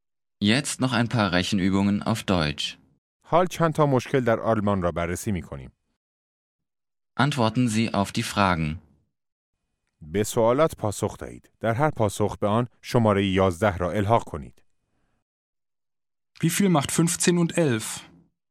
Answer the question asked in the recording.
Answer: Sechsundzwanzig. Das macht 26.